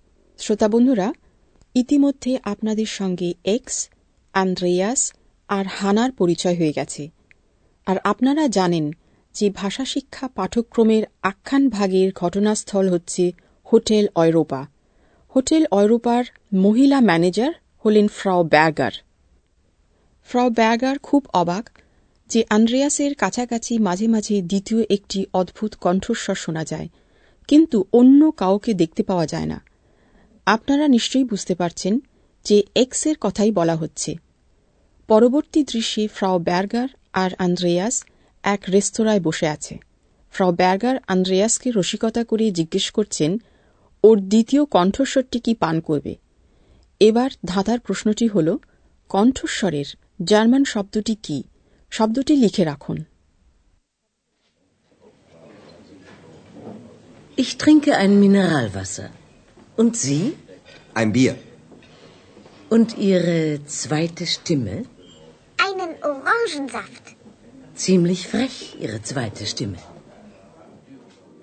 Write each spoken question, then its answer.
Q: কণ্ঠস্বরের German শব্দটি কি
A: কণ্ঠস্বরের German শব্দ স্টেমে